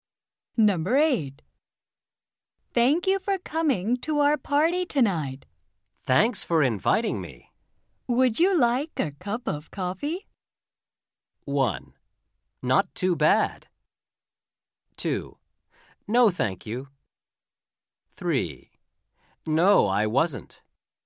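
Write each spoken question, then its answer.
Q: Would you like a cup of coffee?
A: 2: No, thank you.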